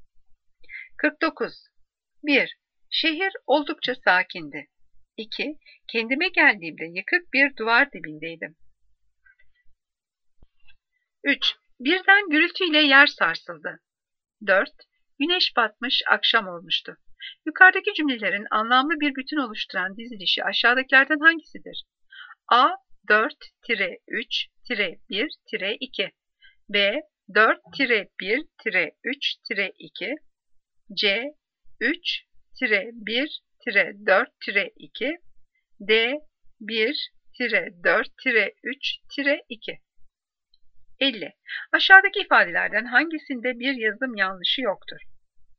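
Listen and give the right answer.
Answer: B: 4-1-3-2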